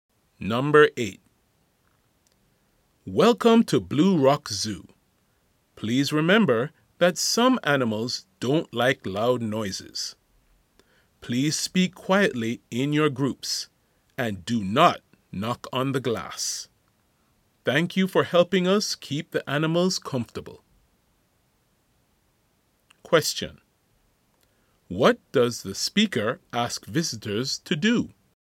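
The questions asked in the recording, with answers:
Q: What does the speaker ask visitors to do?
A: Speak quietly and not knock on the glass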